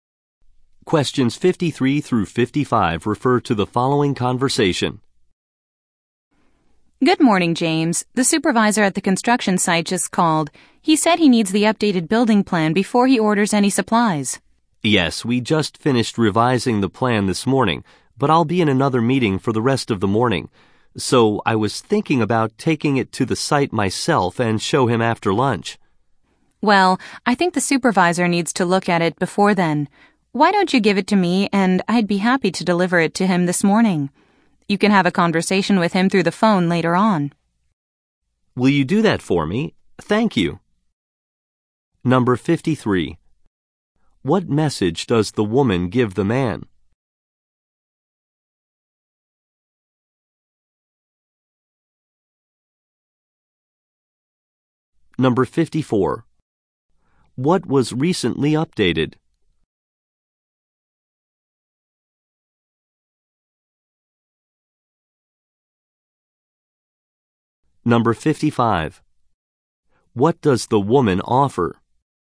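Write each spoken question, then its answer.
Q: What message does the woman give the man?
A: The site supervisor needs the updated building plan

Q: What was recently updated?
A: The building plan

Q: What does the woman offer?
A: To deliver the plan to the supervisor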